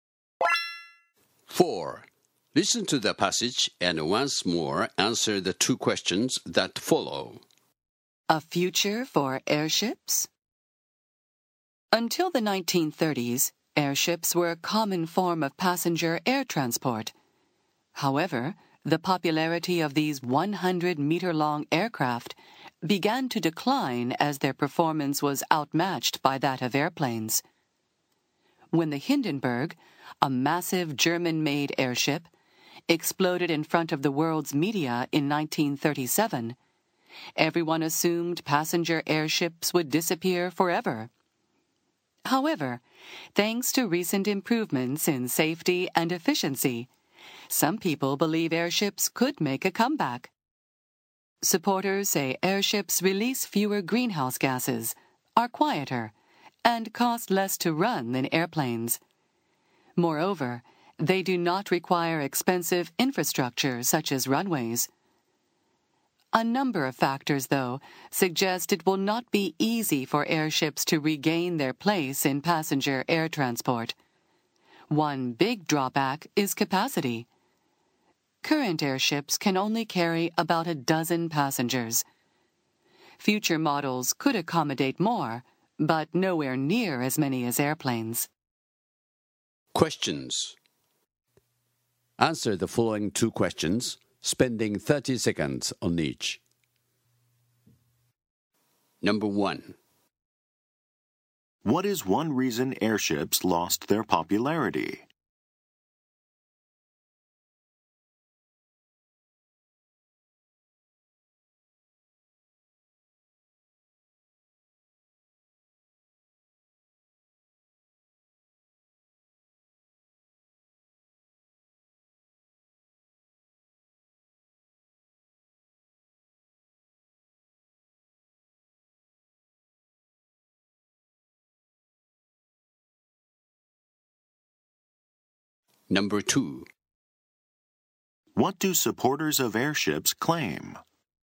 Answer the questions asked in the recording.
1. The Hindenburg disaster led to a lack of confidence in airship safety.
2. Supporters point out that airships are more environmentally friendly, produce less greenhouse gases, and are quieter and less costly due to reduced infrastructural needs.